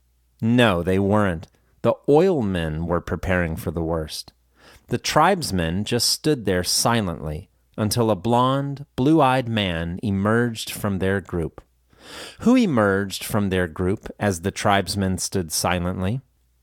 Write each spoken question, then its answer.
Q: Who emerged from their group as the tribesmen stood silently?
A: A blonde, blue-eyed man emerged from their group as the tribesmen stood silently.